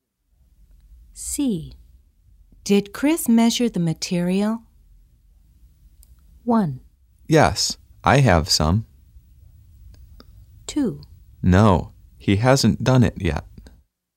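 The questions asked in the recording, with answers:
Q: Did Chris measure the material?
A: 2: No, he hasn't done it yet.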